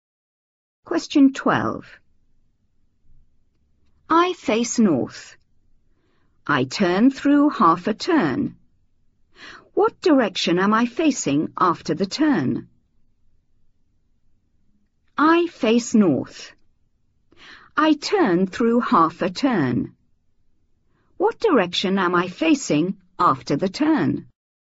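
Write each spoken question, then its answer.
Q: What direction am I facing after the turn?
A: South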